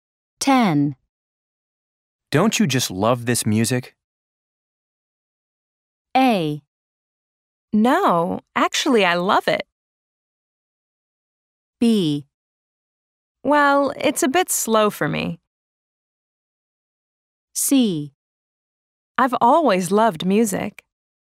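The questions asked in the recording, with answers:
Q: Don't you just love this music?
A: B: Well, it's a bit slow for me.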